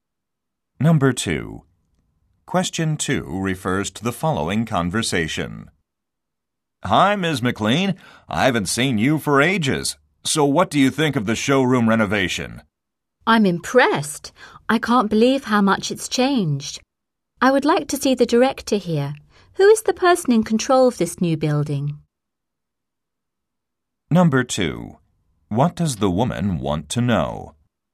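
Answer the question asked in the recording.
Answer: Who is in charge of the new building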